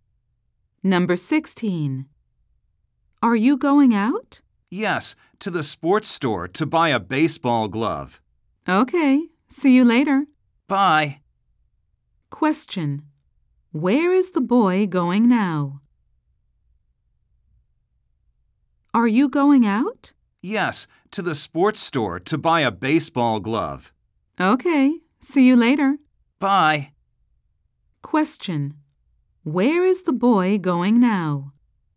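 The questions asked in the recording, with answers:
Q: Where is the boy going now?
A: To the sports store.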